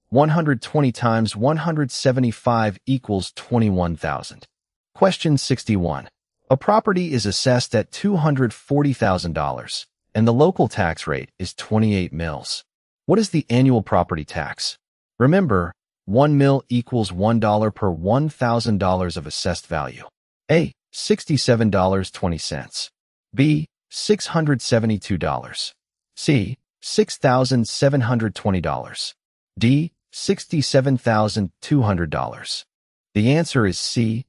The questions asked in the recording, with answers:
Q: What is the annual property tax?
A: The answer is C.